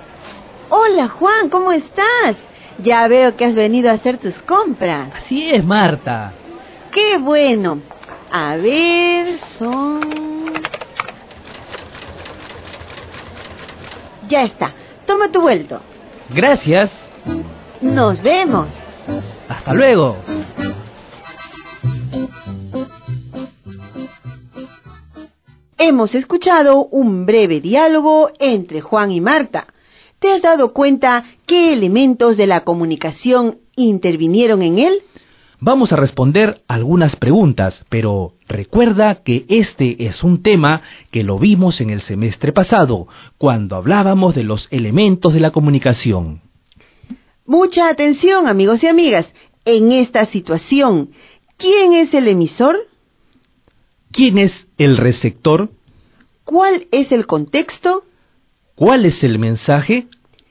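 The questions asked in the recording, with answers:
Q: ¿Cuál es el contexto?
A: Una tienda, donde Juan hace sus compras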